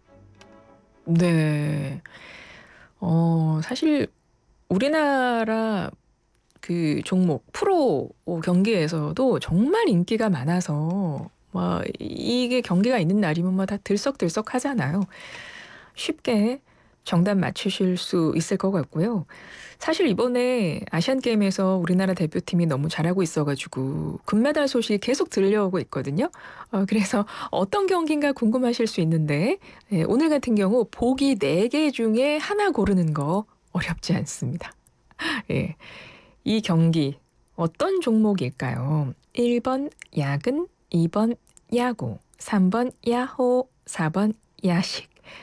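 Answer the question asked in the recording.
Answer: 2: 야구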